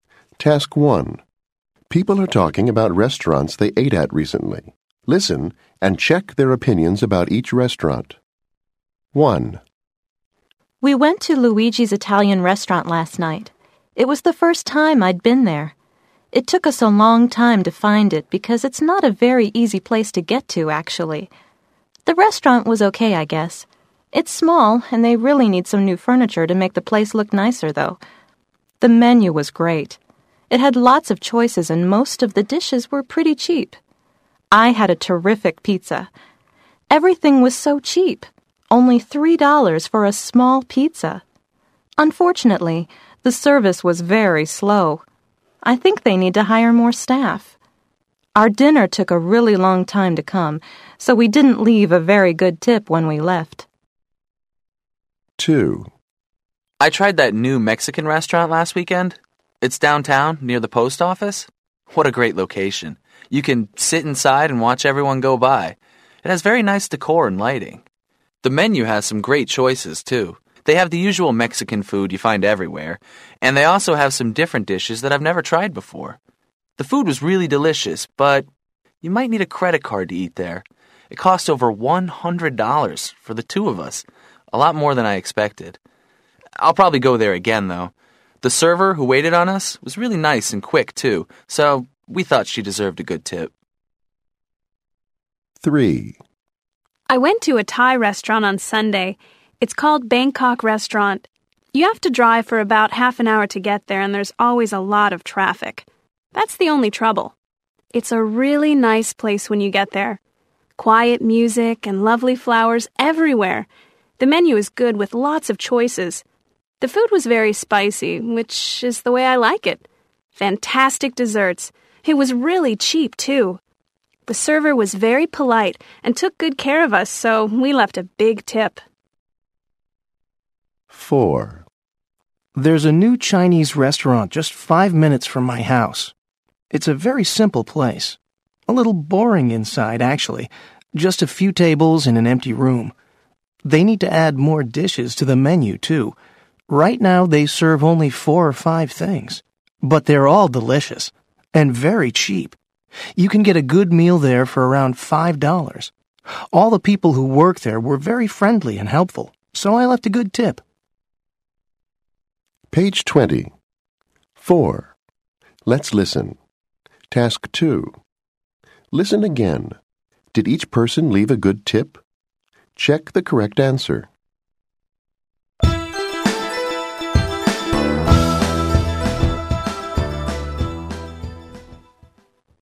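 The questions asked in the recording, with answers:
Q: Did each person leave a good tip?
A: No

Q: Did each person leave a good tip?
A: Yes

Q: Did each person leave a good tip?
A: Yes

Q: Did each person leave a good tip?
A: Yes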